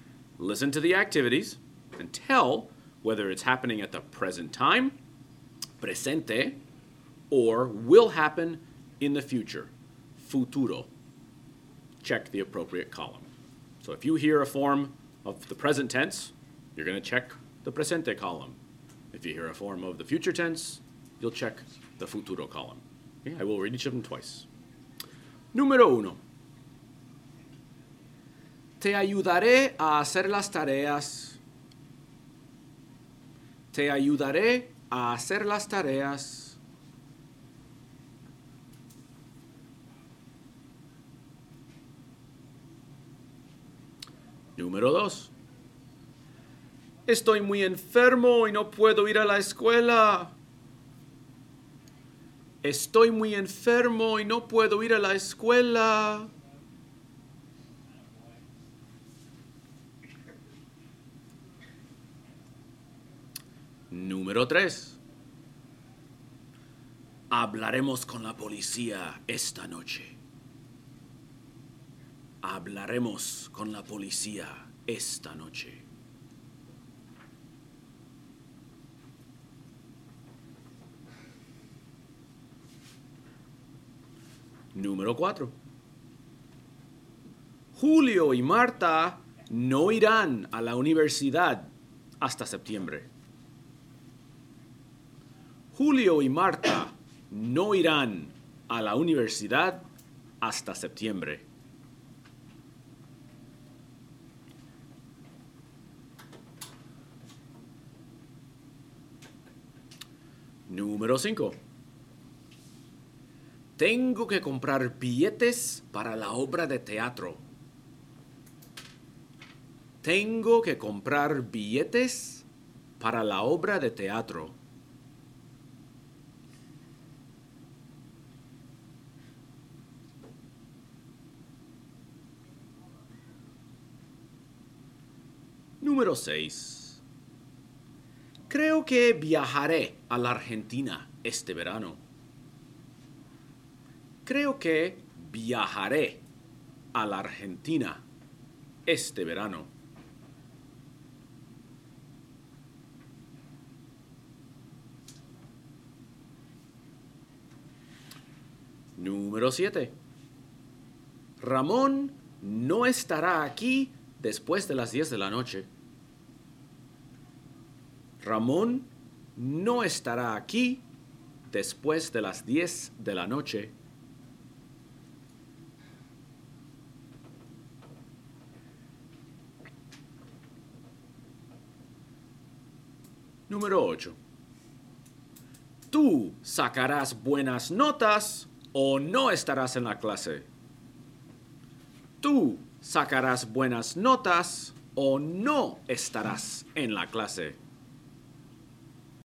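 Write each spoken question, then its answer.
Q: Te ayudaré a hacer las tareas.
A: futuro

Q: Estoy muy enfermo y no puedo ir a la escuela.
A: presente

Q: Hablaremos con la policía esta noche.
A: futuro

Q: Julio y Marta no irán a la universidad hasta septiembre.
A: futuro

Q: Tengo que comprar billetes para la obra de teatro.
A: presente

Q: Creo que viajaré a la Argentina este verano.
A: futuro

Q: Ramón no estará aquí después de las 10 de la noche.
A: futuro

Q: Tú sacarás buenas notas o no estarás en la clase.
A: futuro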